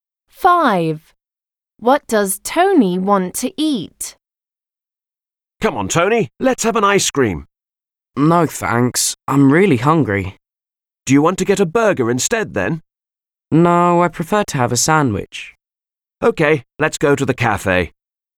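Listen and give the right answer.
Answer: A sandwich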